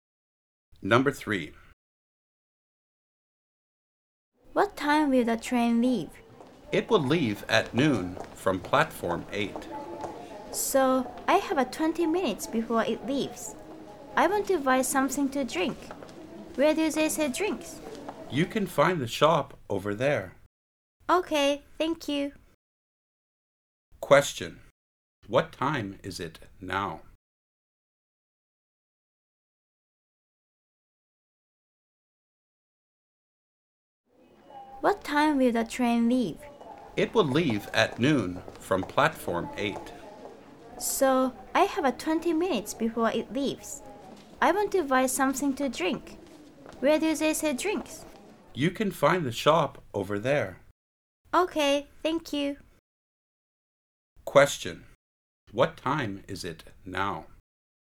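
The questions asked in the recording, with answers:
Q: What time is it now?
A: 11:40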